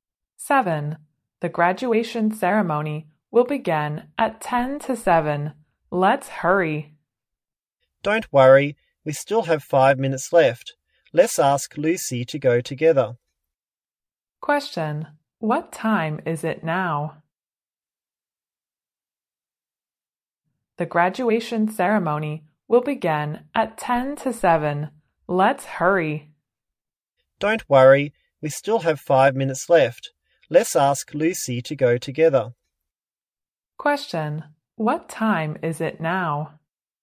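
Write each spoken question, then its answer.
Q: What time is it now?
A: 6:45.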